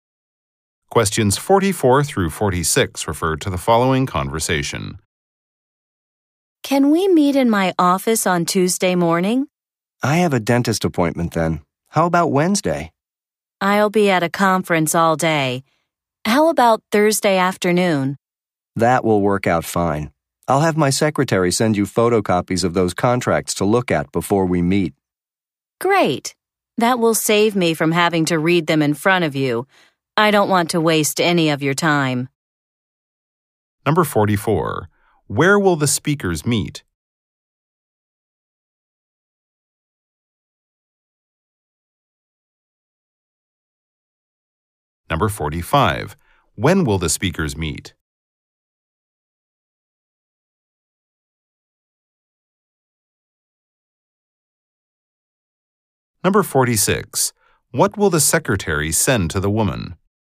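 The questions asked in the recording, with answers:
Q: When will the speakers meet?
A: Thursday afternoon.

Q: What will the secretary send to the woman?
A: Photocopies of contracts.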